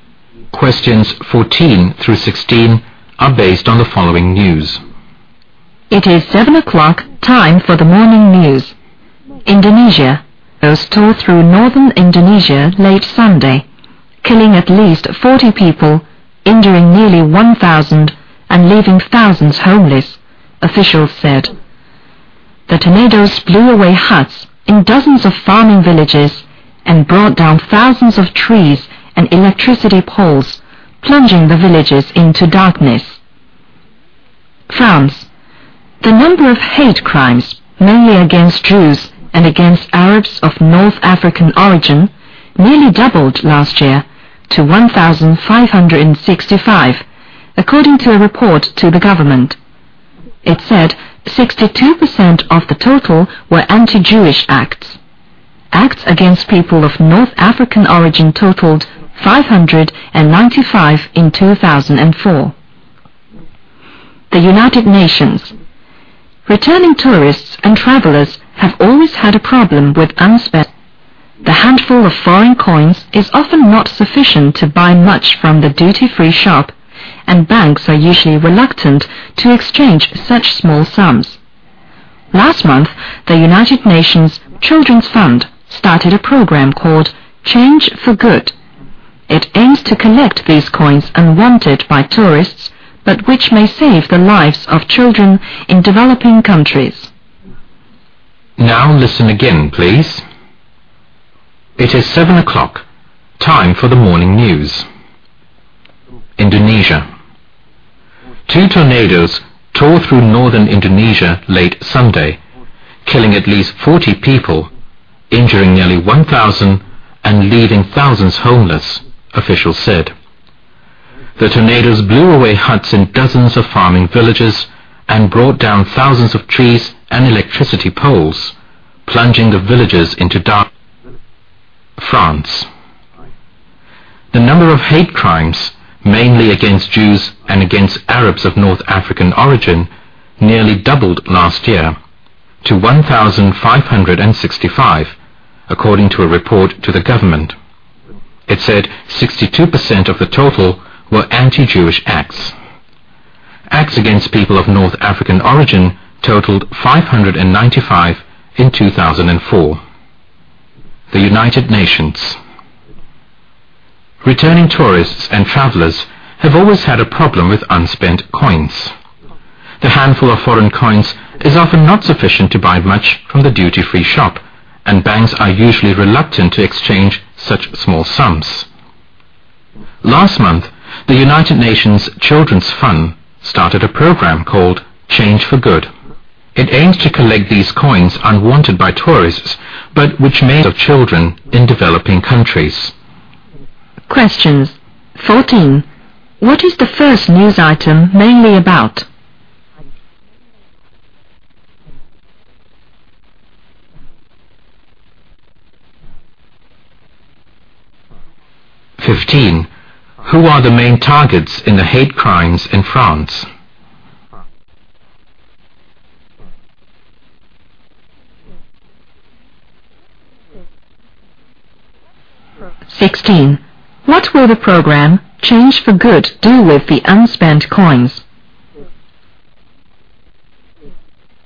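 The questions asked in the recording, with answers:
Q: What is the first news item mainly about?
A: Tornadoes in northern Indonesia

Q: Who are the main targets in the hate crimes in France?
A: Jews and Arabs of North African origin

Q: What will the program Change for Good do with the unspent coins?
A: Use them to help save children in developing countries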